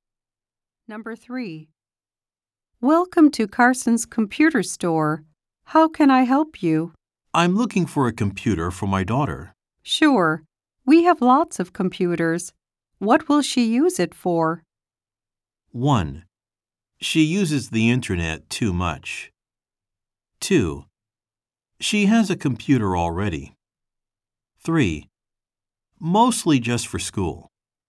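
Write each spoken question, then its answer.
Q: What will she use it for?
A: 3: Mostly just for school.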